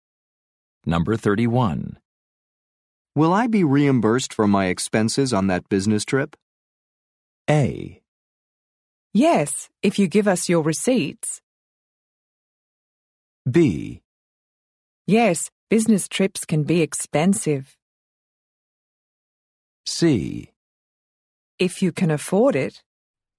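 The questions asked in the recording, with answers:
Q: Will I be reimbursed for my expenses on that business trip?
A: A: Yes, if you give us your receipts.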